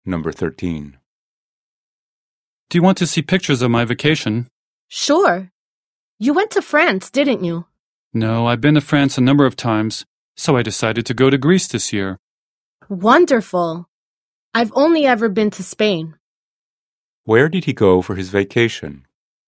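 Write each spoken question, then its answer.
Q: Where did he go for his vacation?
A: Greece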